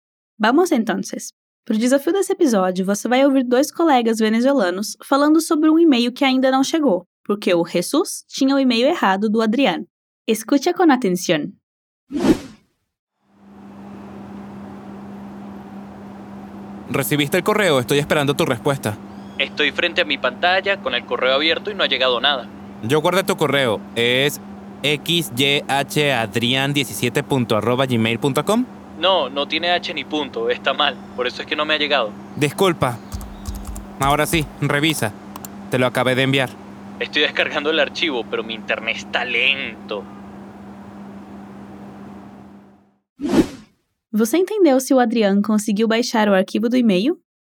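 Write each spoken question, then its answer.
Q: Você entendeu si o consiguió conseguiu baixar o arquivo do e-mail?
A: Não, ainda está baixando o arquivo porque a internet está lenta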